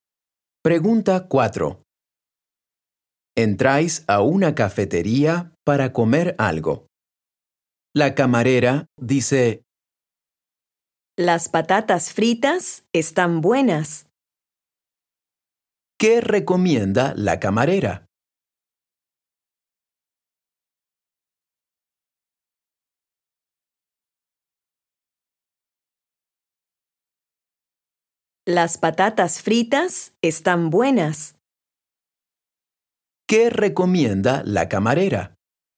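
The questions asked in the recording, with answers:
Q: ¿Qué recomienda la camarera?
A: Las patatas fritas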